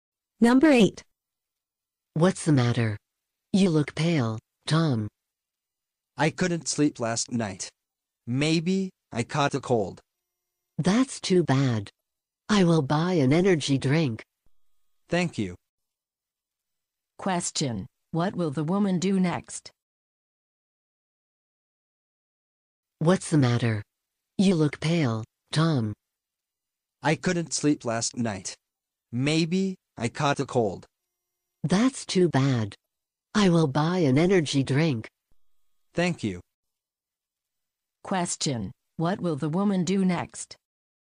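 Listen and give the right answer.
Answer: Buy an energy drink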